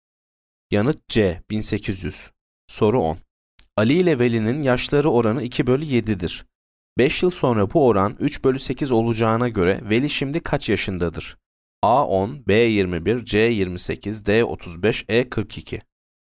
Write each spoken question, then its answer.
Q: 5 yıl sonra bu oran 3 bölü 8 olacağına göre Veli şimdi kaç yaşındadır?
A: Yanıt D 35.